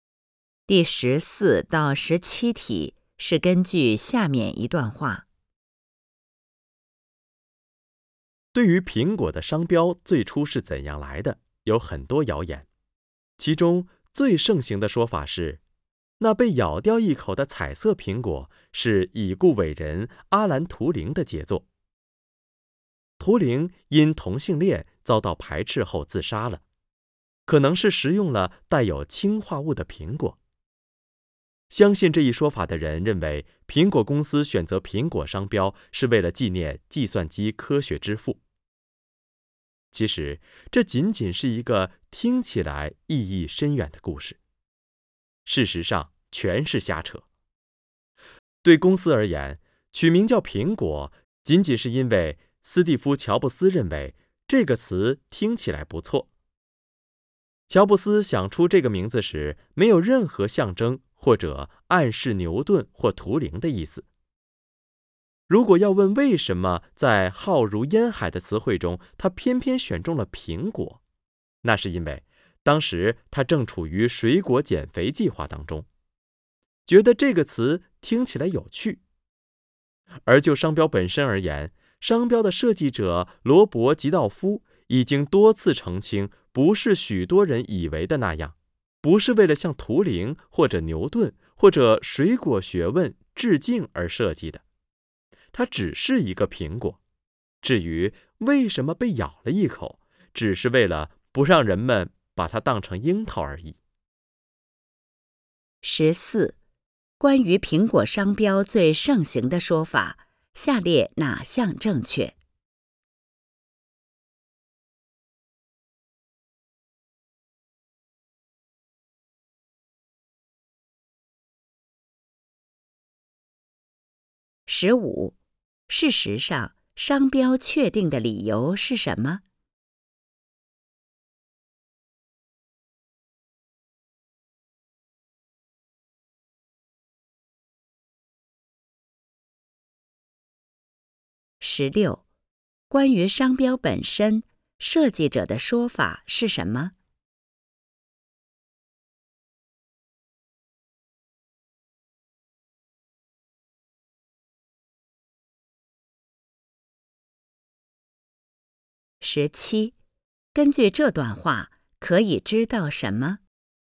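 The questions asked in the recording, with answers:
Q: 事实上,商标确定的理由是什么?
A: 乔布斯认为"苹果"这个词听起来不错

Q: 关于商标本身,设计者的说法是什么?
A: 它只是一个苹果,不是为了向图灵或牛顿致敬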